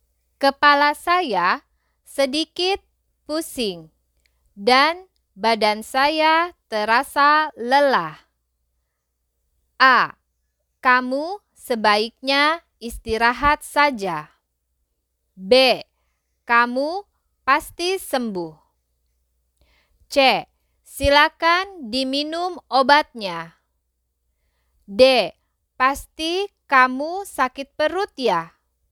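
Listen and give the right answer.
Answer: A: Kamu sebaiknya istirahat saja.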